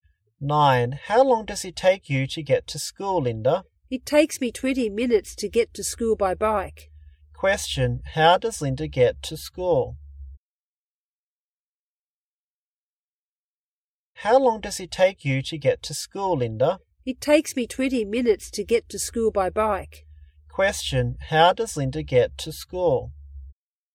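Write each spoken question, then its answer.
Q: how does Linda get to school?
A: By bike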